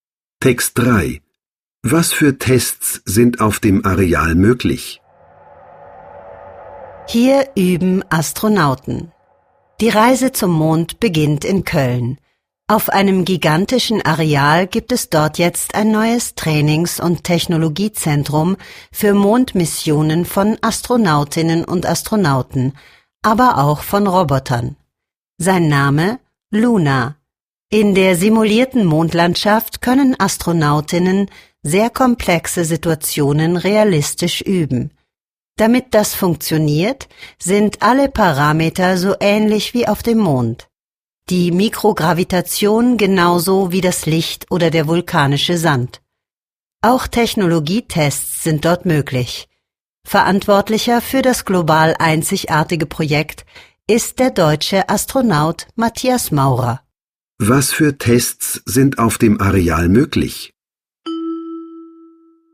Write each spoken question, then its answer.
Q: Was für Tests sind auf dem Areal möglich?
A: Technologietests sind auf der simulierten Mondlandschaft möglich.